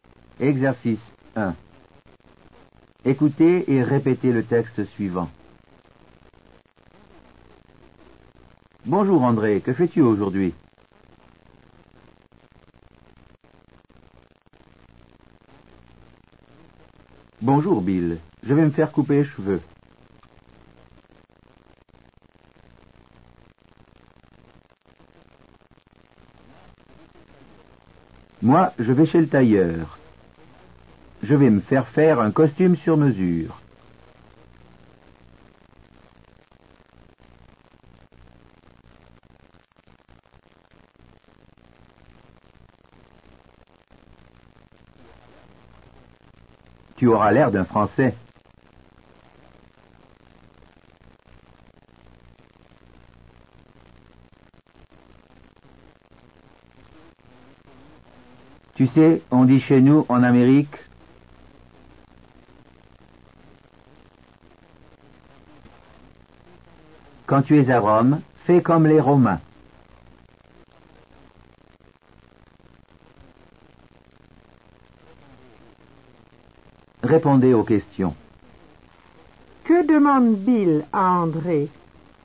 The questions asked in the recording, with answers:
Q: Que demande Bill à André?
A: Il lui demande ce qu'il fait aujourd'hui.